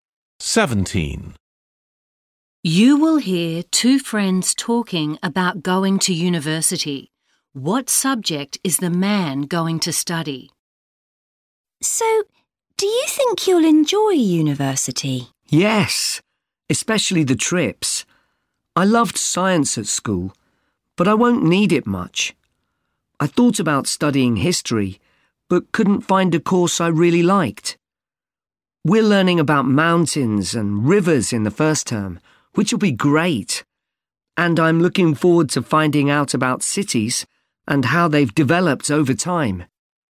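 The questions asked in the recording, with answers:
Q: What subject is the man going to study?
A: Geography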